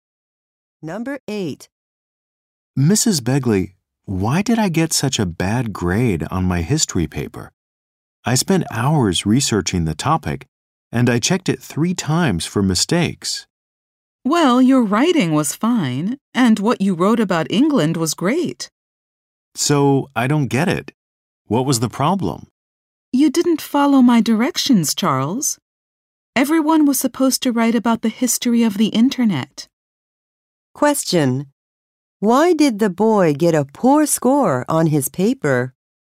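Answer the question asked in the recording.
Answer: He didn't follow directions; he wrote about England instead of the history of the Internet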